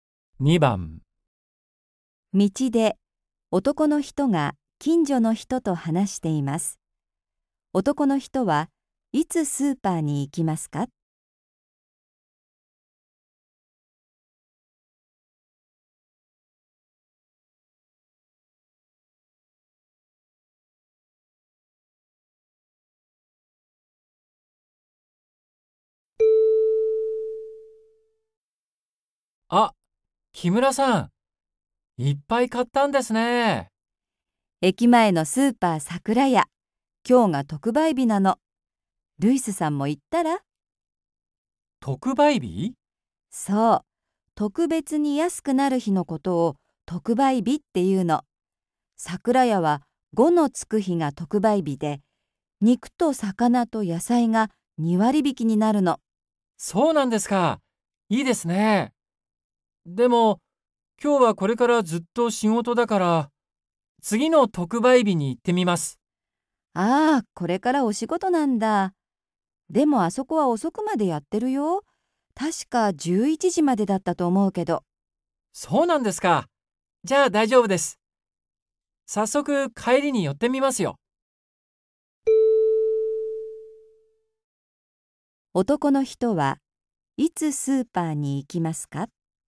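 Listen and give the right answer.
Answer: 今日、仕事の帰り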